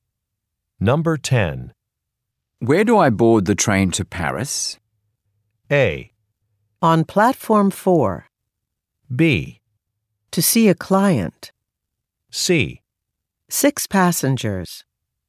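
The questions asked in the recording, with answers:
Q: Where do I board the train to Paris?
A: A: On platform 4.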